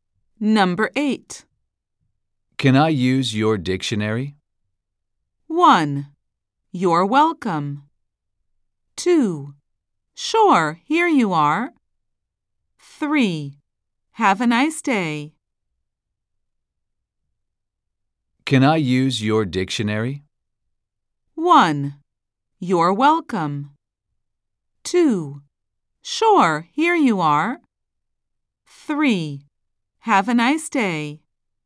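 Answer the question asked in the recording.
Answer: 2: Sure, here you are.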